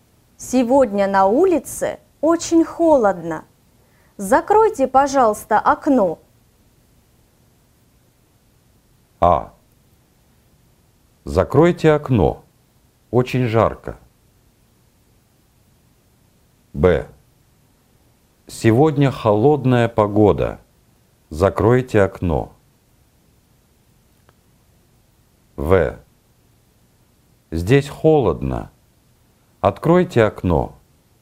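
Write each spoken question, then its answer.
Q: Сегодня на улице очень холодно. Закройте, пожалуйста, окно.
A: Б: Сегодня холодная погода. Закройте окно.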